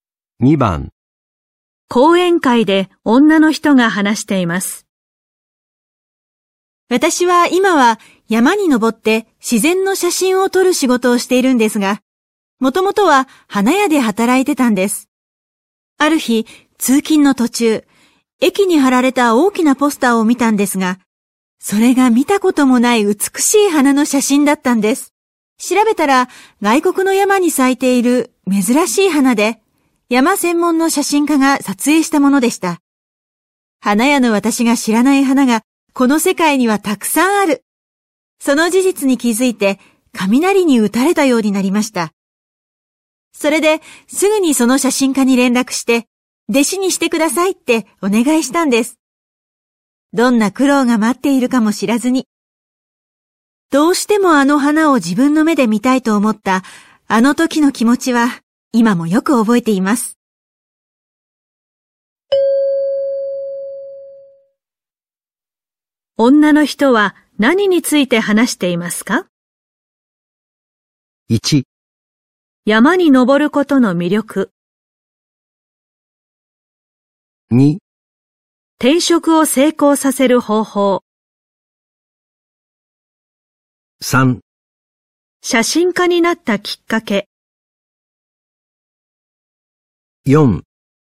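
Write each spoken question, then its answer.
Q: 女の人は何について話していますか?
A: 3: 写真家になったきっかけ。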